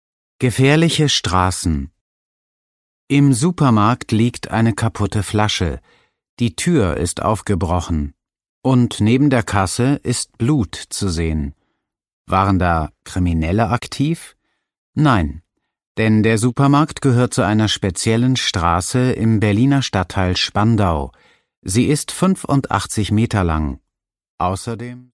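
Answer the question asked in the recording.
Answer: 85 Meter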